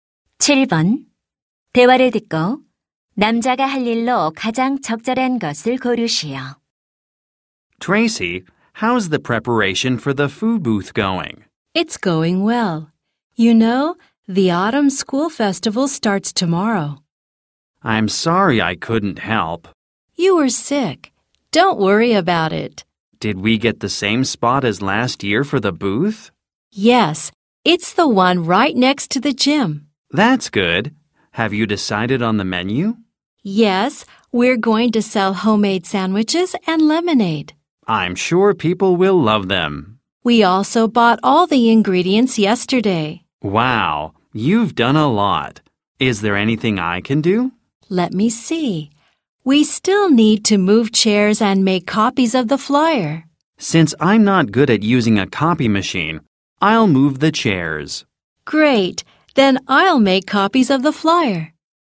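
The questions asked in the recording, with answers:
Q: 대화를 듣고 남자가 할 일로 가장 적절한 것을 고르시오.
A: 의자 옮기기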